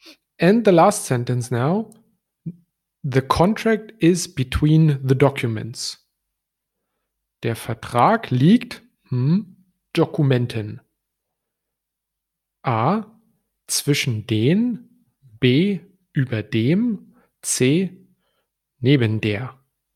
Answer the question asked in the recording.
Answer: And the right answer is A.